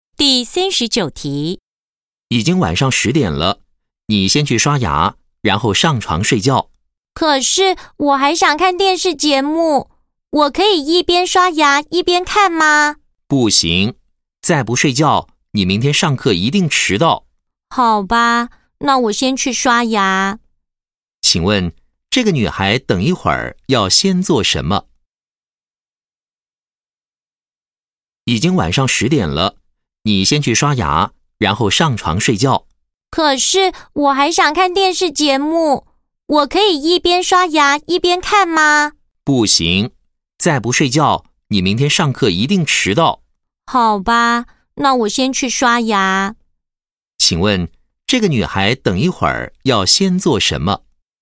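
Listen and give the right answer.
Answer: 刷牙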